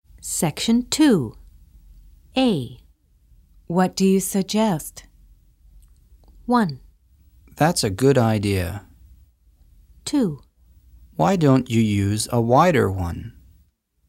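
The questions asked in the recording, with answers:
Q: What do you suggest?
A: 2: Why don't you use a wider one?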